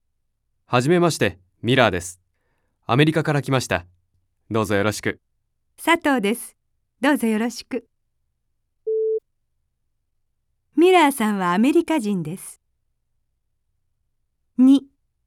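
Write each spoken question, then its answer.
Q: ミラーさんはアメリカ人です。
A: ○(正しい)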